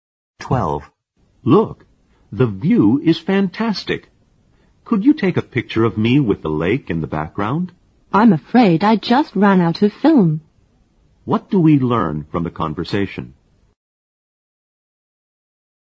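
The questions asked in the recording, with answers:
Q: What do we learn from the conversation?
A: The picture can't be taken because the camera is out of film.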